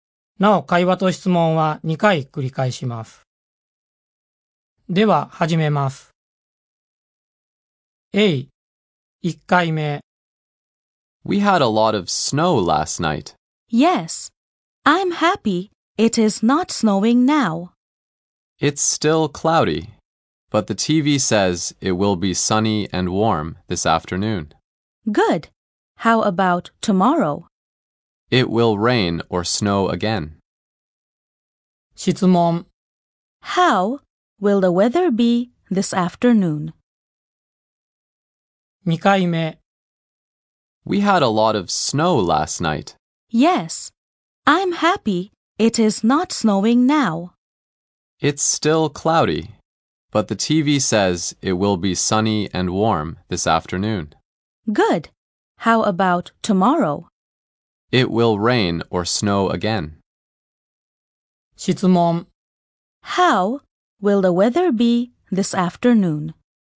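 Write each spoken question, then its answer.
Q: How will the weather be this afternoon?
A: It will be sunny and warm.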